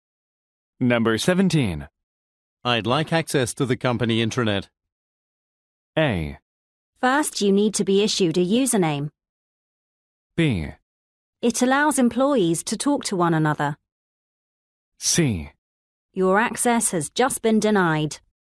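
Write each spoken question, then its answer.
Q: I'd like access to the company intranet.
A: A: First, you need to be issued a username.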